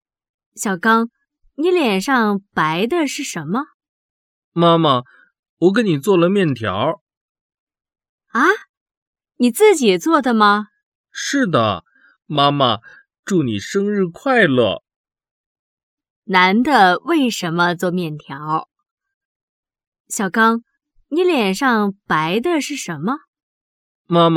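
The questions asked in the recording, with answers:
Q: 男的为什么做面条?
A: 因为是妈妈的生日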